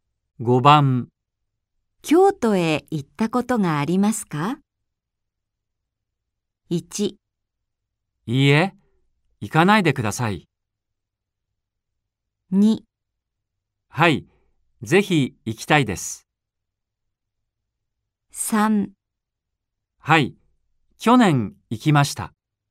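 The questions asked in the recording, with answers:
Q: 京都へ行ったことがありますか?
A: 3: はい、去年行きました。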